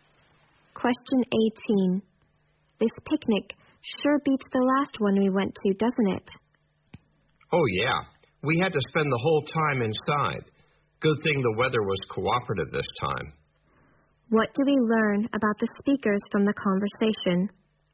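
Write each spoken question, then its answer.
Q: What do we learn about the speakers from the conversation?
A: The weather was bad at their last picnic, so they had to stay inside.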